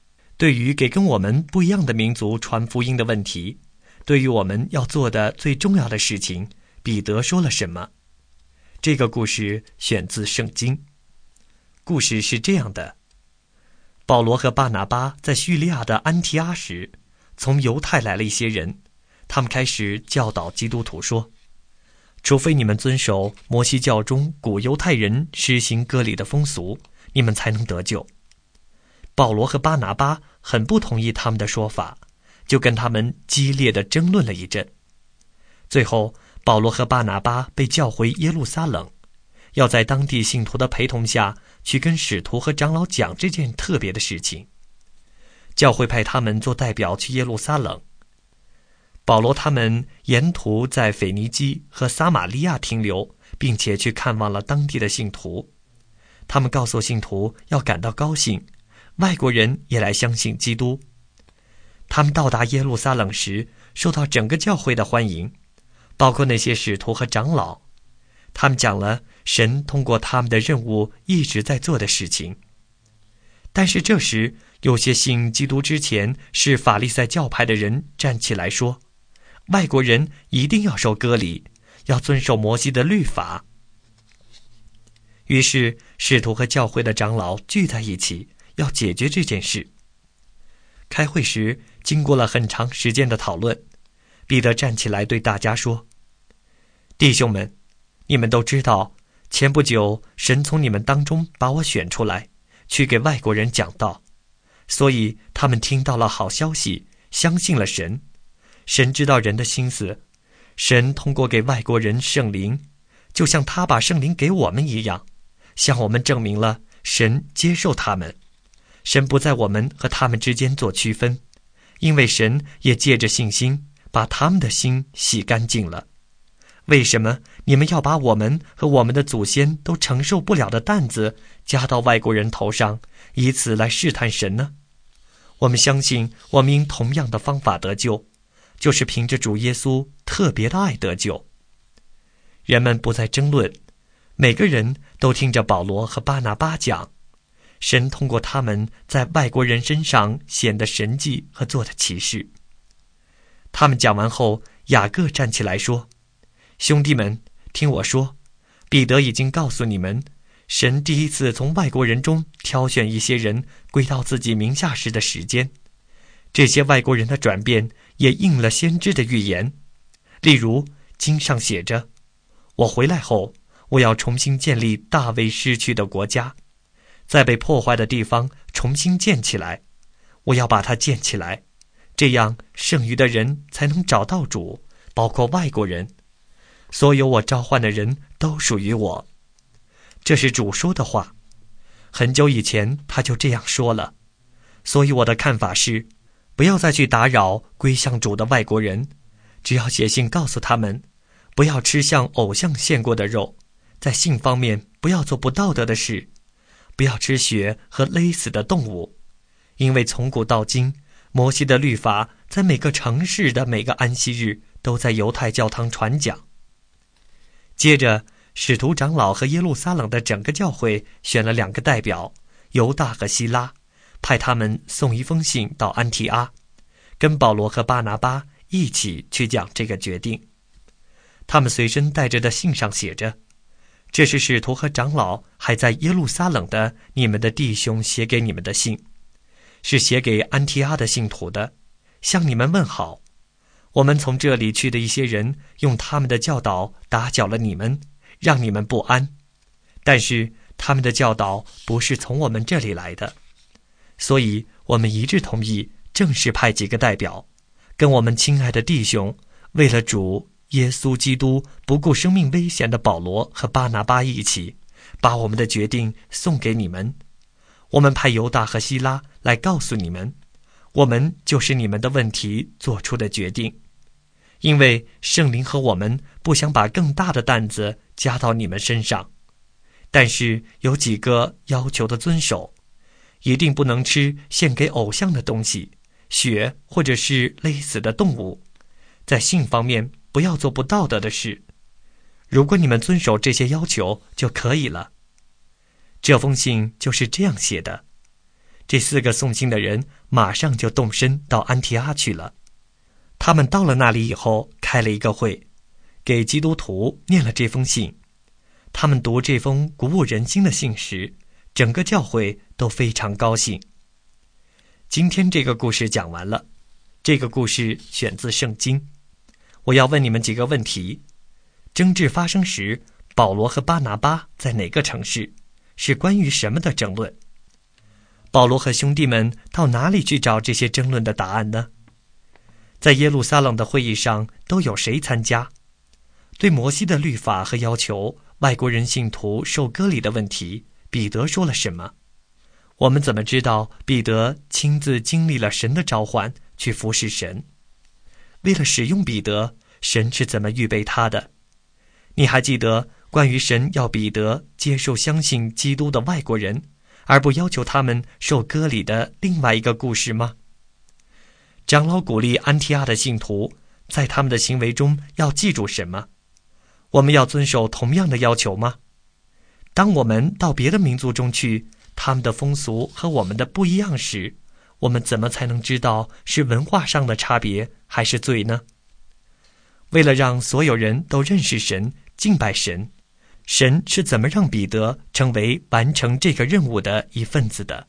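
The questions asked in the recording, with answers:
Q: 争执发生时,保罗和巴拿巴在哪个城市?是关于什么的争论?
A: 在叙利亚的安提阿;争论的是外国信徒是否要受割礼、遵守摩西的律法才能得救

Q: 保罗和兄弟们到哪里去找这些争论的答案呢?在耶路撒冷的会议上都有谁参加?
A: 去耶路撒冷;参加会议的有使徒和长老(还有保罗、巴拿巴、彼得、雅各等)

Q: 对摩西的律法和要求,外国人信徒受割礼的问题,彼得说了什么?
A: 神不在我们和外国人之间做区分,不要把我们的祖先和我们都承受不了的担子加到他们身上;大家都是凭着主耶稣特别的爱得救

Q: 长老鼓励安提阿的信徒在他们的行为中要记住什么?我们要遵守同样的要求吗?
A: 不吃献给偶像的东西,不吃血和勒死的动物,在性方面不做不道德的事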